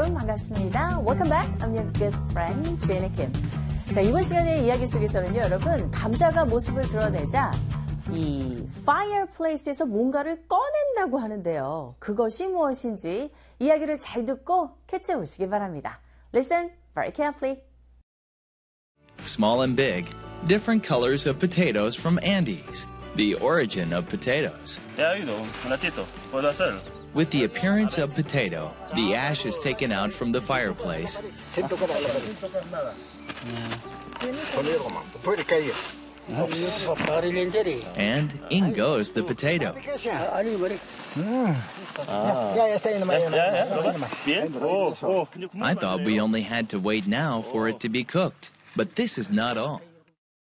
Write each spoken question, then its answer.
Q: 감자가 모습을 드러내자 이 fireplace에서 뭔가를 꺼낸다고 하는데요. 그것이 무엇인지 이야기를 잘 듣고 캐치해 보시기 바랍니다.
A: 그래서 남은 재들을 꺼내는 모습입니다.